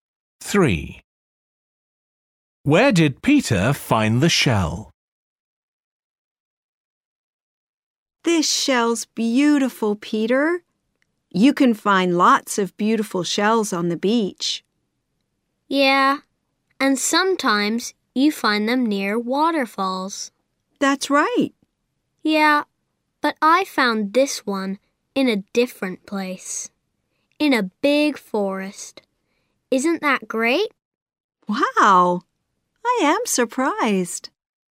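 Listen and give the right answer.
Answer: In a big forest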